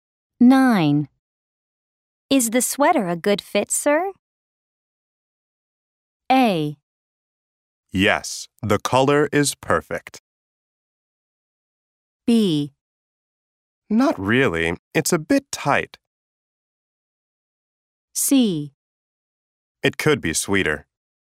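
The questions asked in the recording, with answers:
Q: Is the sweater a good fit, sir?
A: B: Not really, it's a bit tight.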